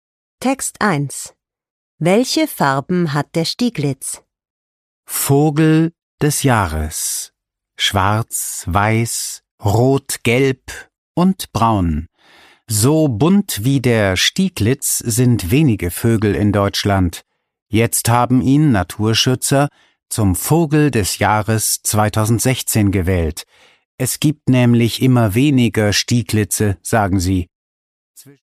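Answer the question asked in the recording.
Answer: Schwarz, weiß, rot, gelb und braun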